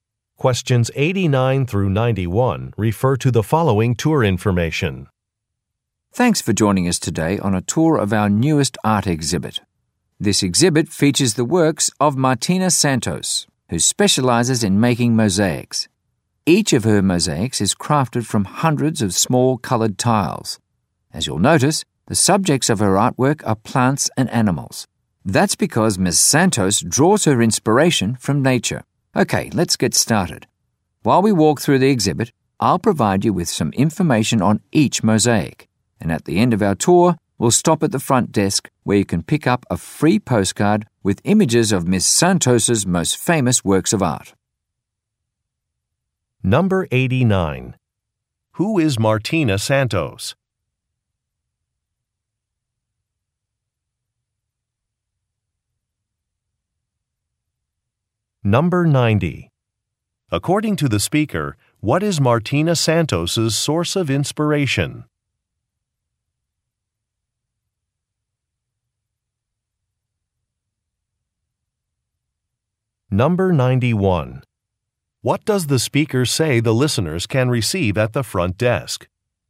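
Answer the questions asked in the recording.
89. An artist who makes mosaics
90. Nature
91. A free postcard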